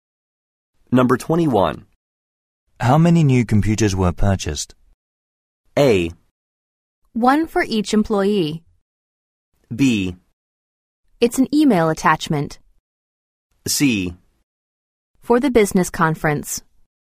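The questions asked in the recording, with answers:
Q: How many new computers were purchased?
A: A: One for each employee.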